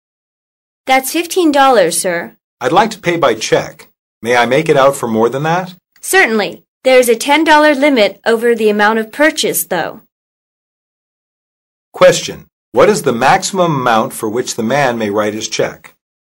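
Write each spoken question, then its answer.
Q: What is the maximum amount for which the man may write his check?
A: $25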